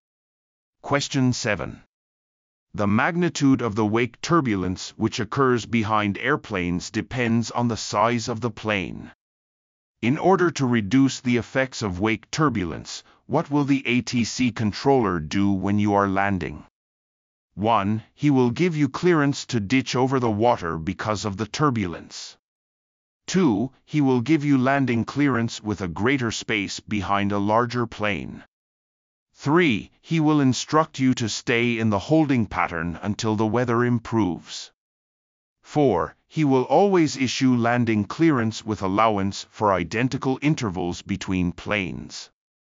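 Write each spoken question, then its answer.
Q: In order to reduce the effects of wake turbulence, what will the ATC controller do when you are landing?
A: 2: He will give you landing clearance with a greater space behind a larger plane.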